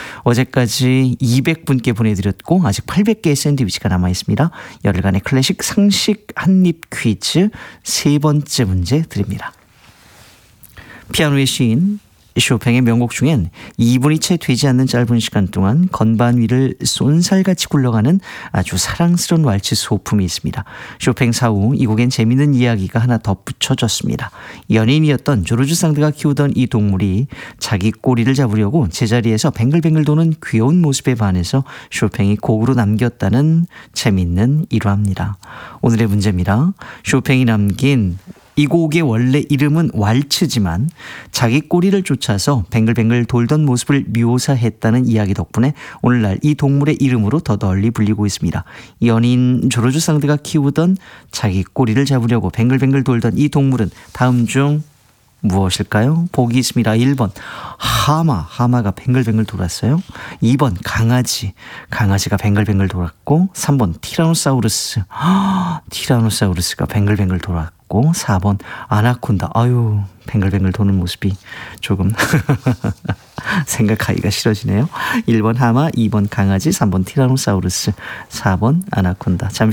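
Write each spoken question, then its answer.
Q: 연인 조르주 상드가 키우던 자기 꼬리를 잡으려고 뱅글뱅글 돌던 이 동물은 다음 중 무엇일까요?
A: 2: 강아지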